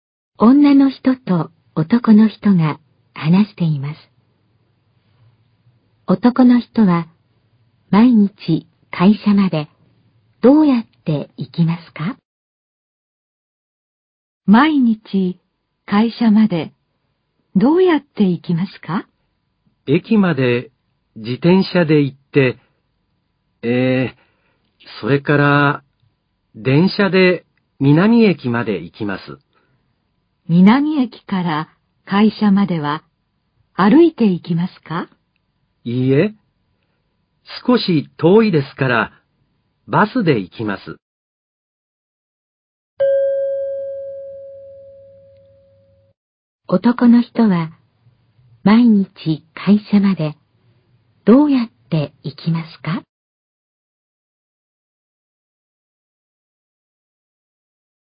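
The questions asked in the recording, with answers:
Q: 男の人は毎日会社までどうやって行きますか?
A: 自転車と電車とバスで行きます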